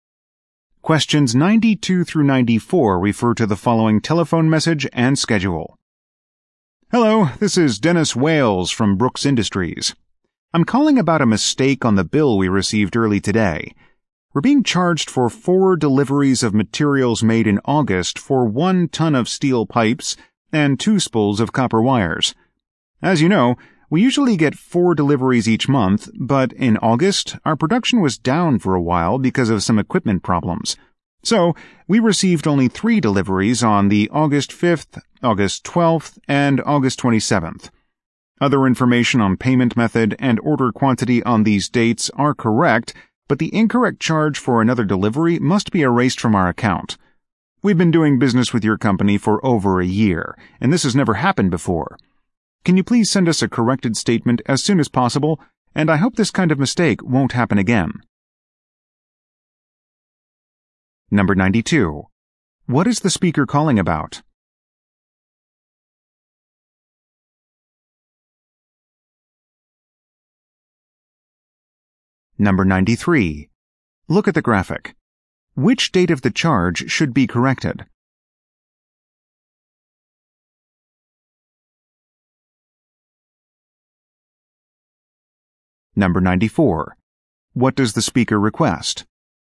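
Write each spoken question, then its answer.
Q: What is the speaker calling about?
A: A mistake on a bill

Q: What does the speaker request?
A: A corrected statement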